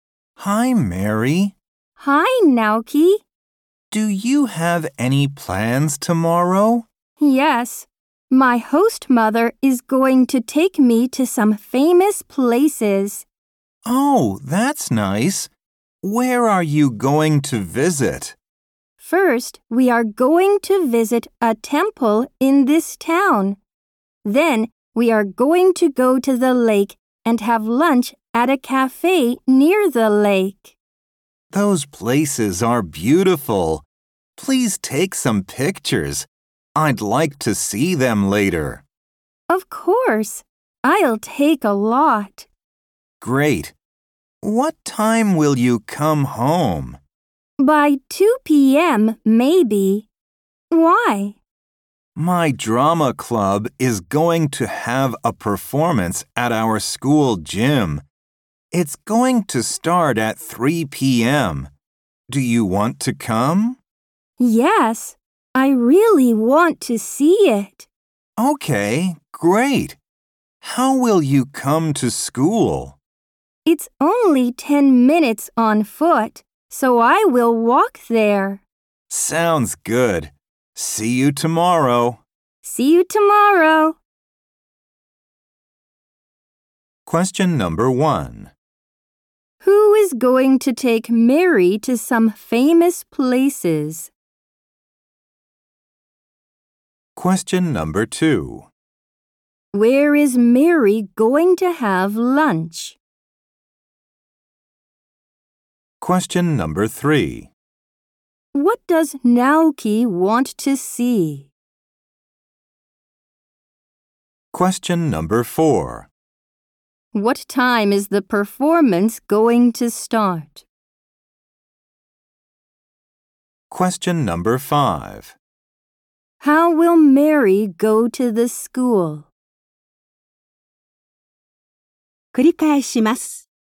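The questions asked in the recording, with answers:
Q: Who is going to take Mary to some famous places?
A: Her host mother

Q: Where is Mary going to have lunch?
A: At a cafe near the lake

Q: What does Naoki want to see?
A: Mary's pictures

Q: What time is the performance going to start?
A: At 3 p.m.

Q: How will Mary go to the school?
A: She will walk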